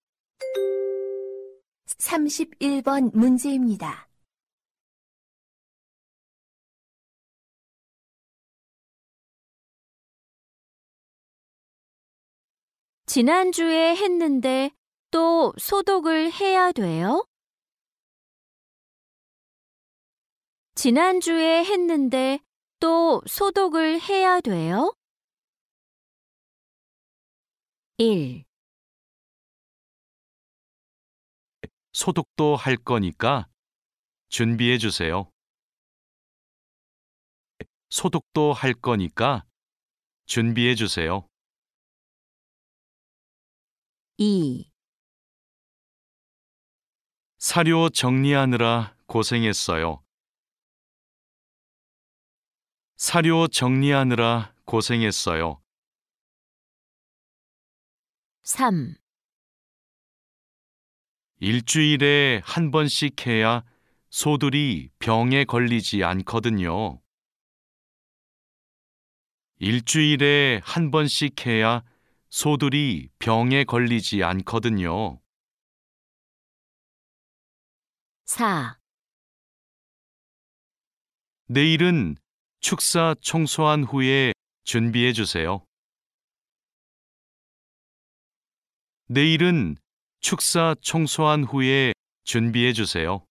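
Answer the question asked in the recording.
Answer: 3: 일주일에 한 번씩 해야 소들이 병에 걸리지 않거든요.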